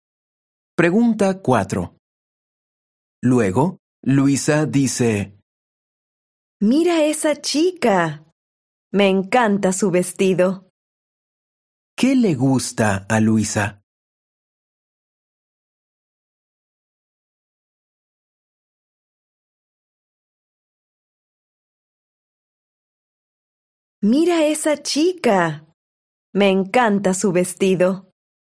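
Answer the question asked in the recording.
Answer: el vestido de una chica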